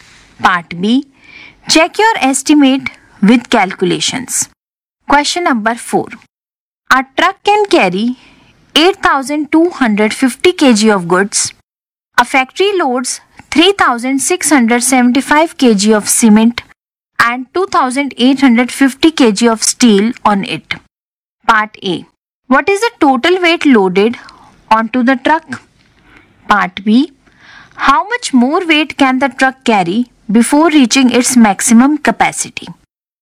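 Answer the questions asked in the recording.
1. 6,525 kg
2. 1,725 kg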